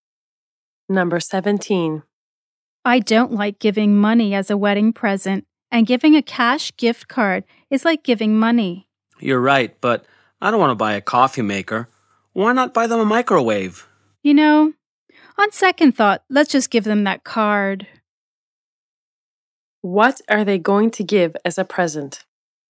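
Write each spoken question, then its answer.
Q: What are they going to give as a present?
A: A cash gift card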